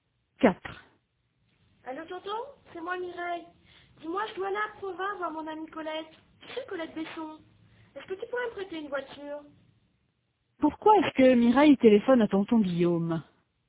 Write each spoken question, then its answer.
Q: Pourquoi est-ce que Mireille téléphone à tonton Guillaume?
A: Pour lui emprunter une voiture.